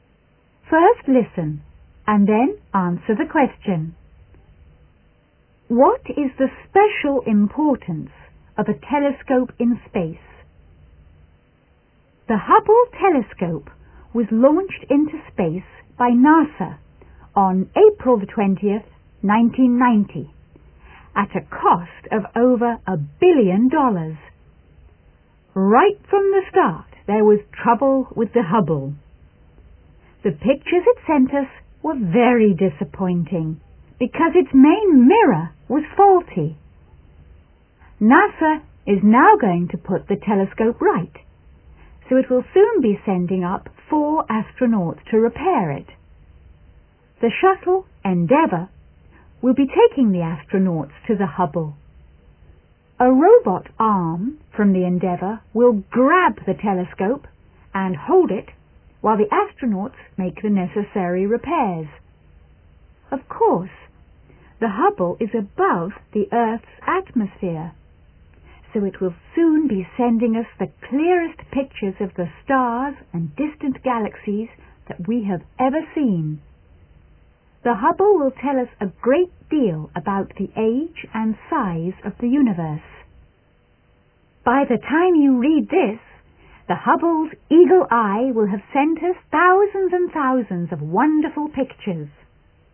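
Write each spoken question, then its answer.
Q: What is the special importance of a telescope in space?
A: It is above the Earth's atmosphere, so it can send the clearest pictures of the stars and distant galaxies.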